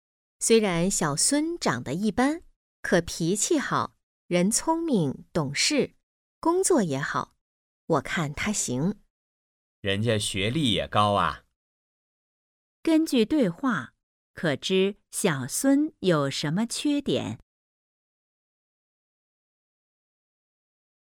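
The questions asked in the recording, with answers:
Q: 根据对话,可知小孙有什么缺点?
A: 长得一般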